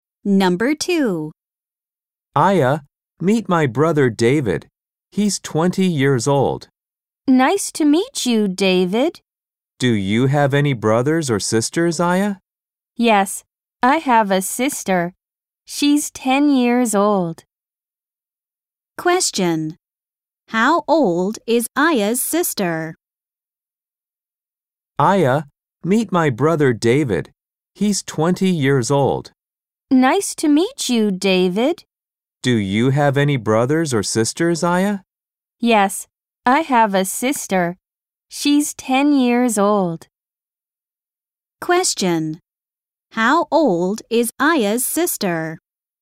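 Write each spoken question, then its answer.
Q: How old is Aya's sister?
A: 10 years old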